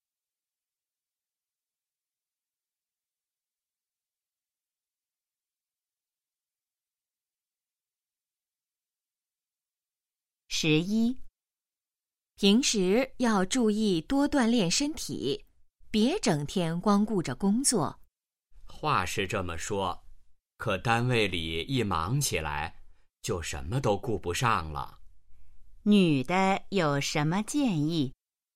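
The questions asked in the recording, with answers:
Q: 女的有什么建议?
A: 多锻炼身体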